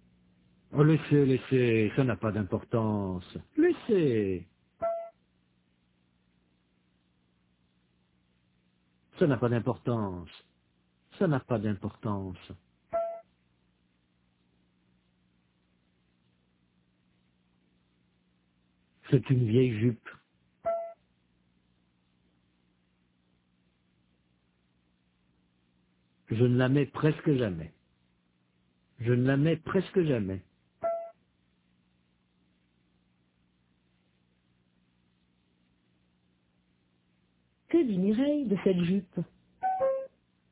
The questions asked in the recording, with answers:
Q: Que dit Mireille de cette jupe?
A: Qu'elle ne la met presque jamais.